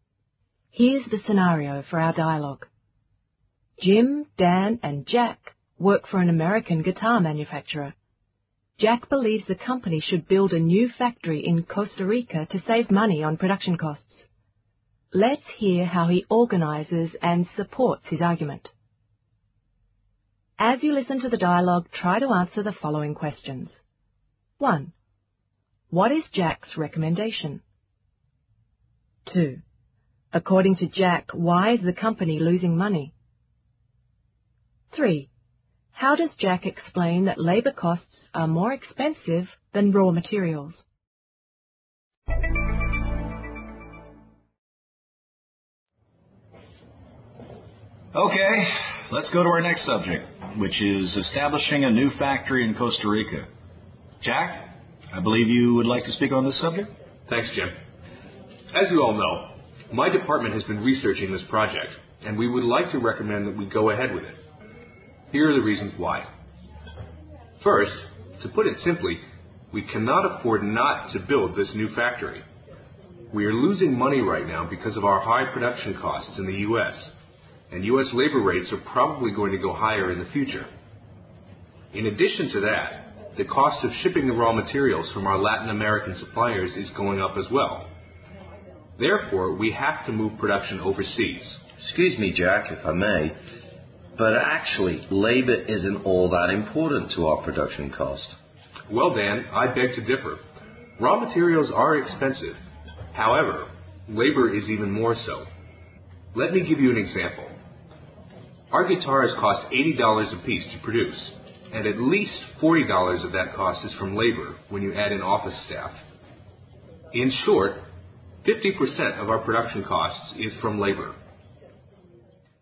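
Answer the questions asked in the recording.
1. To build a new factory in Costa Rica
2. Because of high production costs in the U.S.
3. He gives an example: guitars cost $80 each to produce, and at least $40 of that is labor, so labor is 50% of production costs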